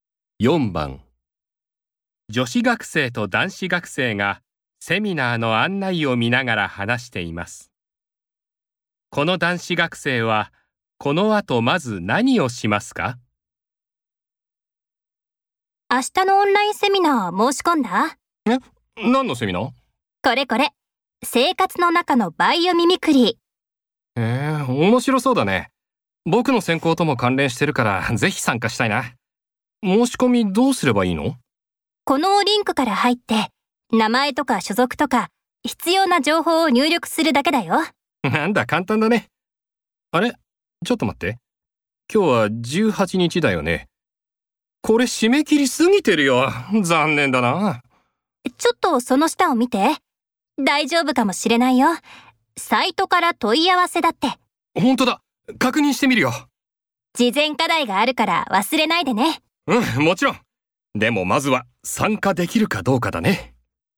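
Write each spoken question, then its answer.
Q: この男子学生はこの後まず何をしますか?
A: サイトから問い合わせて、セミナーに参加できるかどうか確認する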